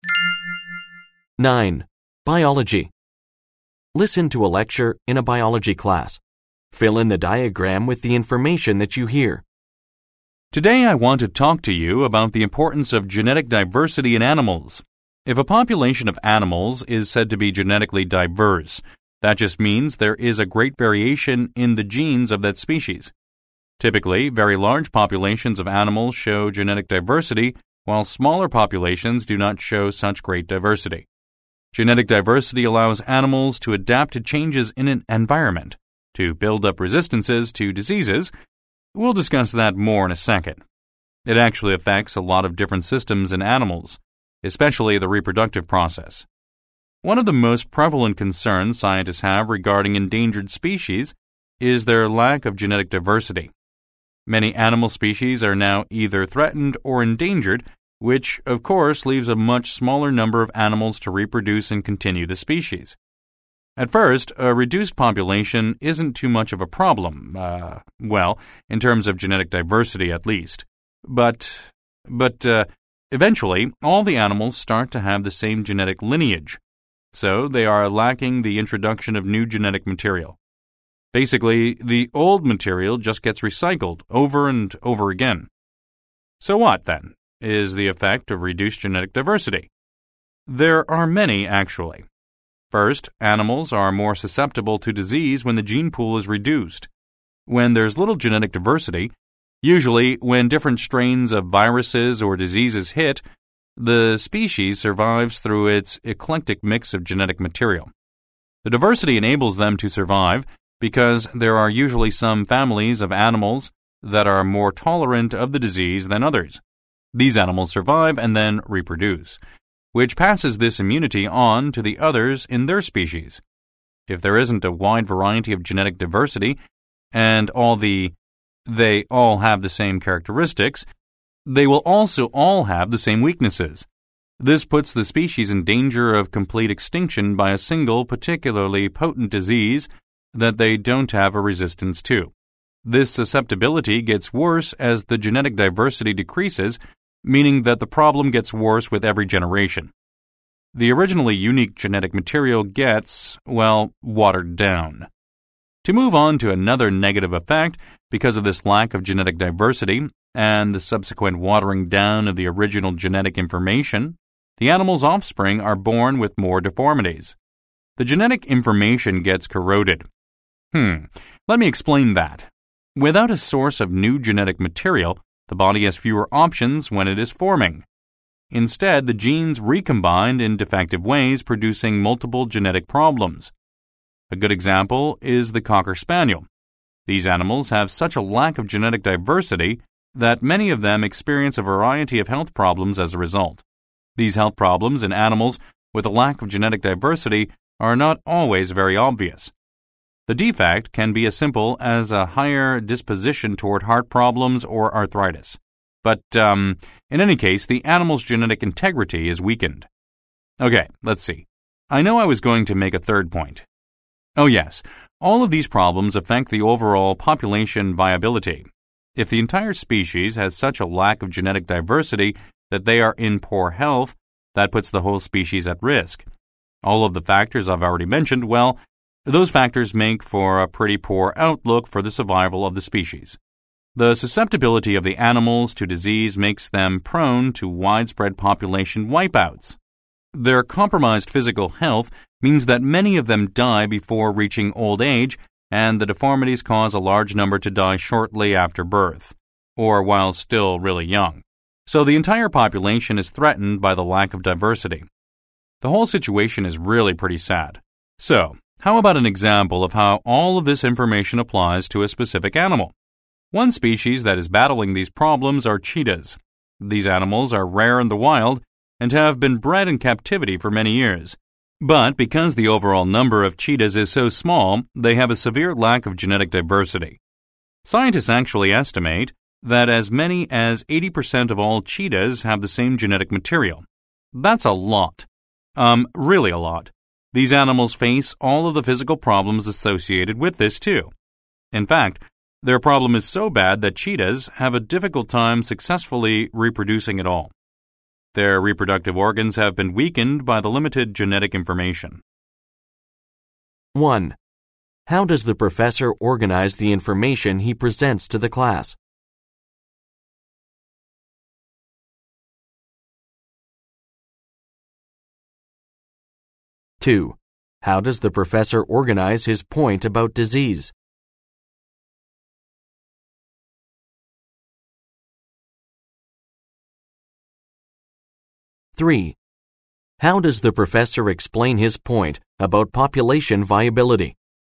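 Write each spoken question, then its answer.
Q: How does the professor organize the information he presents to the class?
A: He defines genetic diversity, lists the negative effects of reduced diversity, then gives an example (cheetahs)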